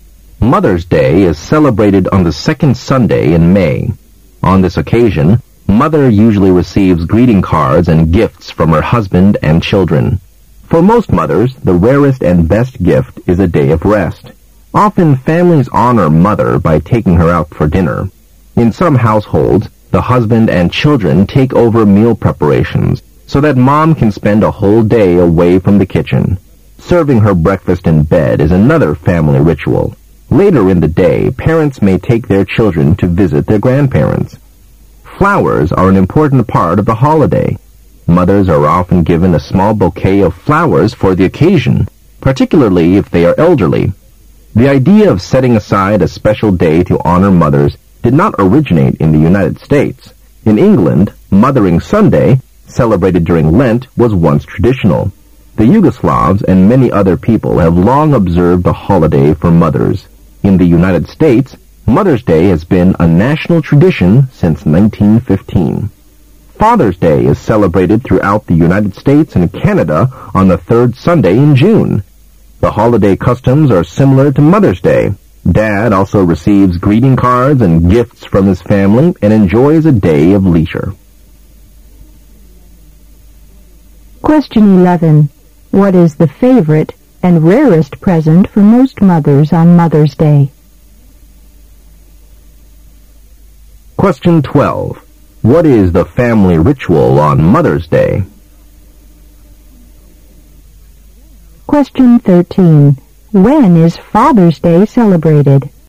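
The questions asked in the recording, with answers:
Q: What is the favorite and rarest present for most mothers on Mother's Day?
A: A day of rest

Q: What is the family ritual on Mother's Day?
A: Serving her breakfast in bed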